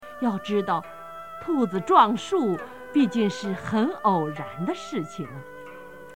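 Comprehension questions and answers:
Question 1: 要知道兔子撞树,毕竟是很偶然的〇〇。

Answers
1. 事情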